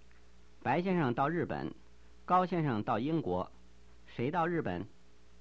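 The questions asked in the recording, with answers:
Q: 谁到日本?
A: 白先生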